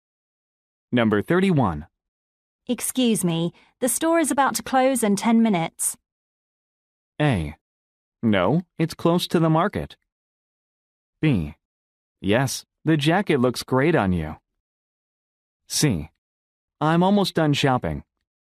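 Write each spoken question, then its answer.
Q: Excuse me, the store is about to close in 10 minutes.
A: C: I'm almost done shopping.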